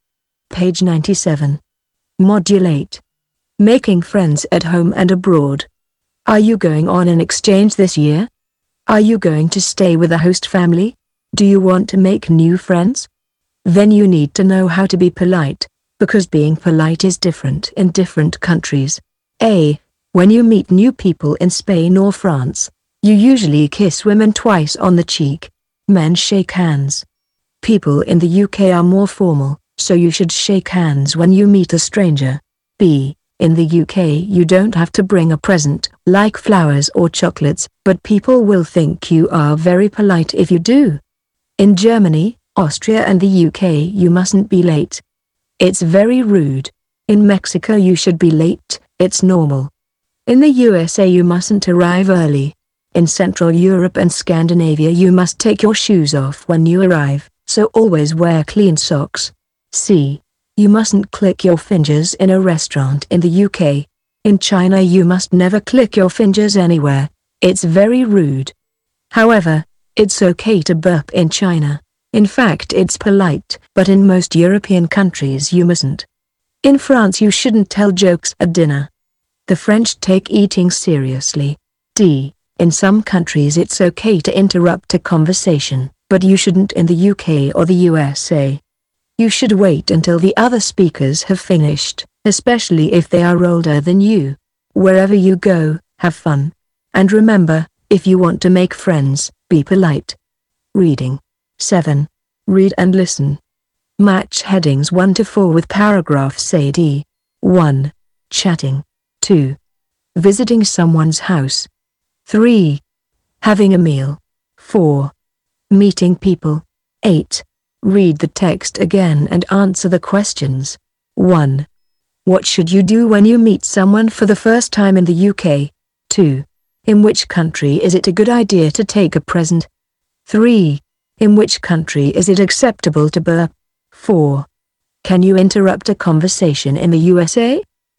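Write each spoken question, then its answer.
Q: What should you do when you meet someone for the first time in the UK?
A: Shake hands

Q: In which country is it a good idea to take a present?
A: The UK

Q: In which country is it acceptable to burp?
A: China

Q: Can you interrupt a conversation in the USA?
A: No, you shouldn't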